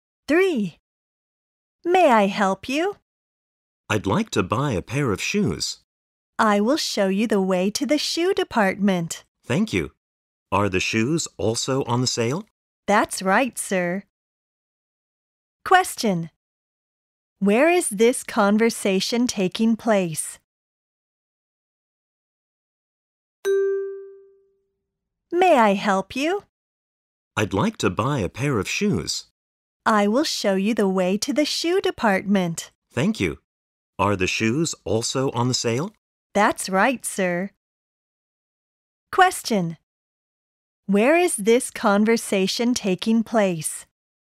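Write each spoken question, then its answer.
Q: Where is this conversation taking place?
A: In a department store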